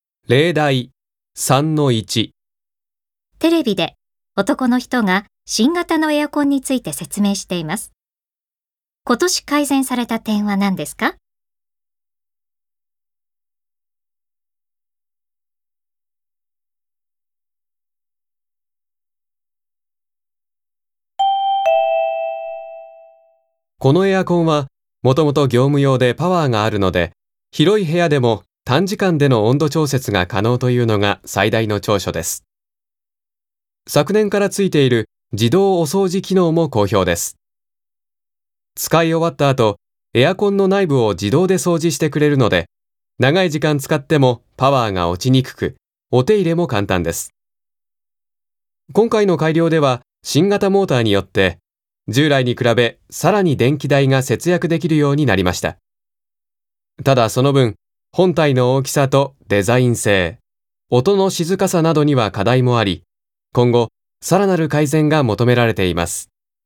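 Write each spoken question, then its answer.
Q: 今年改善された点は何ですか?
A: 新型モーターで電気代がさらに節約できるようになった点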